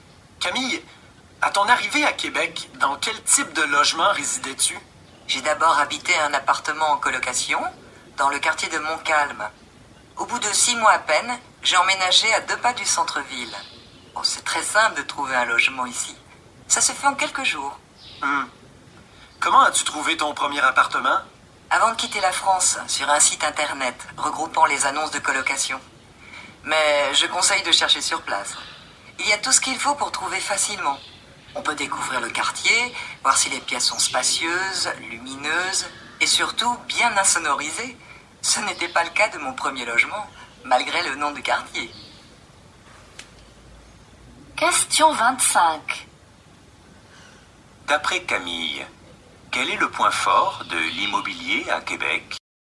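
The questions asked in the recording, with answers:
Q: D'après Camille, quel est le point fort de l'immobilier à Québec?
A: Il est très simple et rapide de trouver un logement (en quelques jours).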